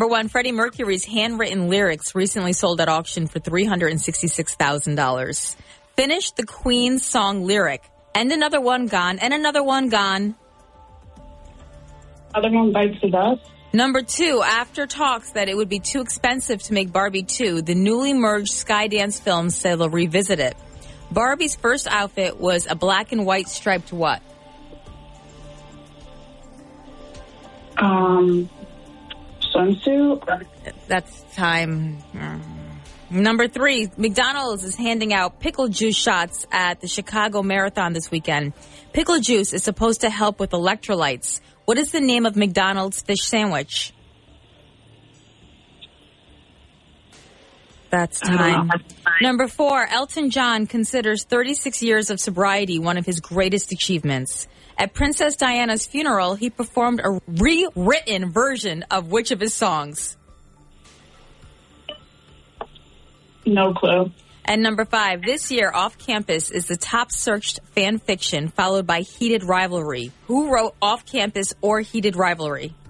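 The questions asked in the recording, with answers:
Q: Barbie's first outfit was a black and white striped what?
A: Swimsuit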